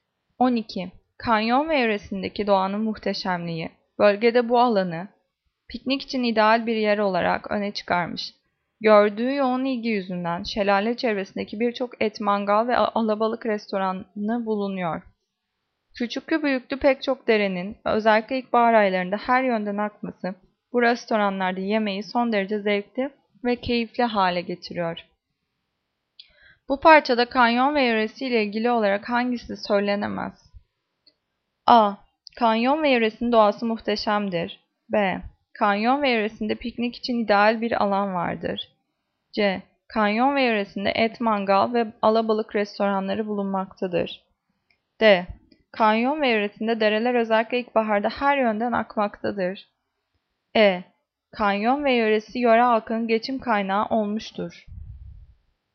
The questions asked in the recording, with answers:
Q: Bu parçada kanyon ve yöresiyle ilgili olarak hangisi söylenemez?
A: Cevap E. Kanyon ve yöresi yöre halkının özellikle geçim kaynağı olmuştur.